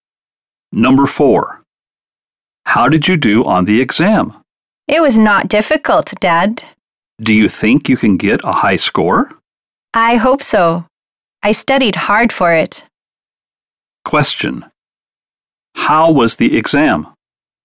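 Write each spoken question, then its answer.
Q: How was the exam?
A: It was not difficult.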